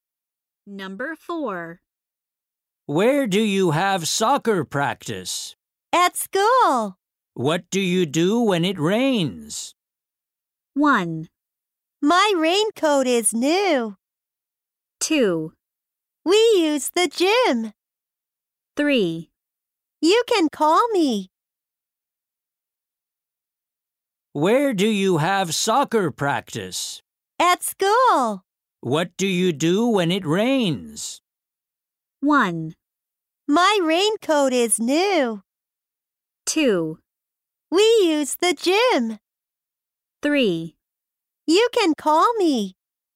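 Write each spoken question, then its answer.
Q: What do you do when it rains?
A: 2: We use the gym.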